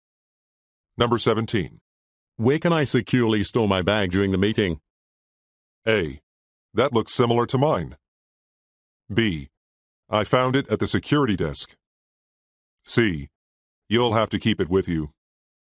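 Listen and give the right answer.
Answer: C: You'll have to keep it with you.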